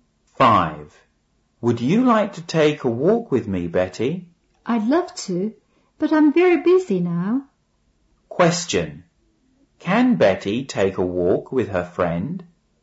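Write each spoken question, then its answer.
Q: Question. Can Betty take a walk with her friend?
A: No, she can't. She's very busy.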